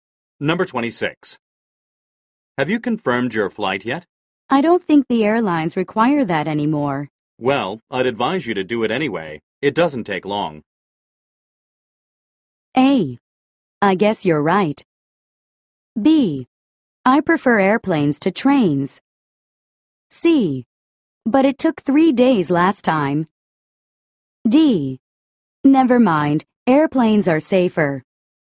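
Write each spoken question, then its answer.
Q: Well, I'd advise you to do it anyway.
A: A: I guess you're right.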